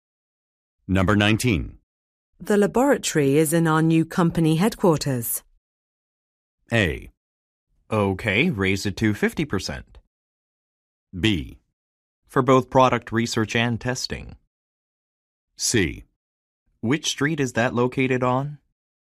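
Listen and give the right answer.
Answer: C: Which street is that located on?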